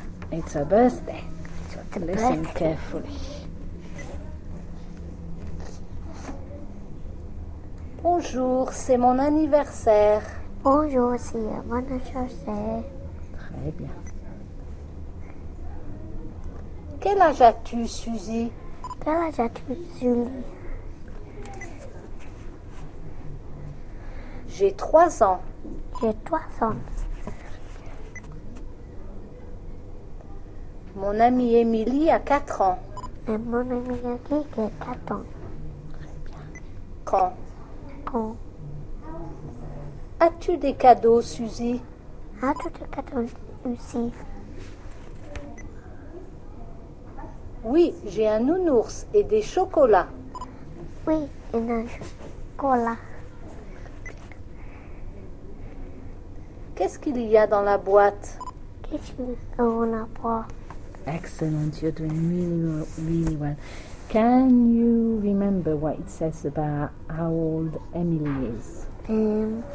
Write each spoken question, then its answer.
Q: Can you remember what it says about how old Emily is?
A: Mon amie Emily a 4 ans.